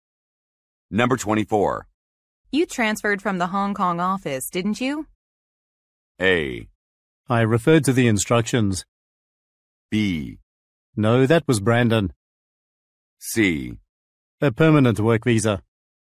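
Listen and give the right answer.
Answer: B: No, that was Brandon.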